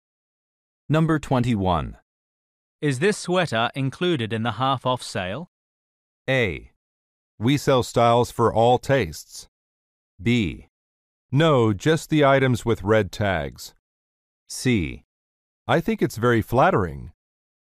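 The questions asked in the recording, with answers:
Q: Is this sweater included in the half-off sale?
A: B: No, just the items with red tags.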